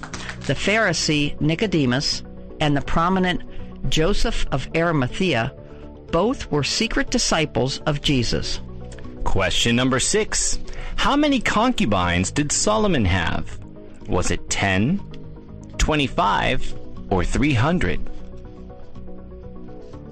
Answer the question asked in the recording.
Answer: And the answer is 300.